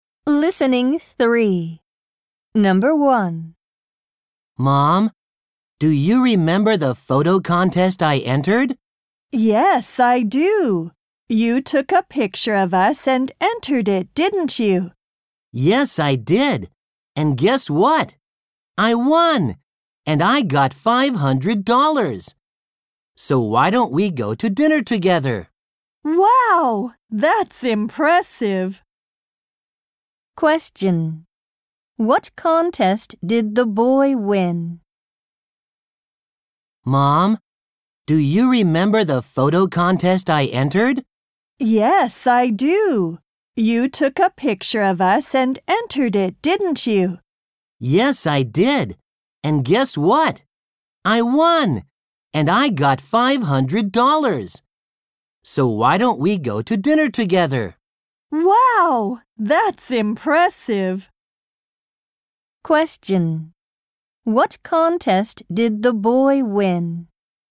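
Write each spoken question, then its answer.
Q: What contest did the boy win?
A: A photo contest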